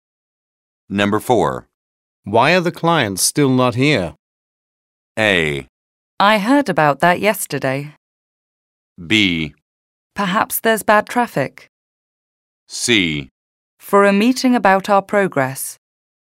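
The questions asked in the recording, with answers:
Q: Why are the clients still not here?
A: B: Perhaps there's bad traffic.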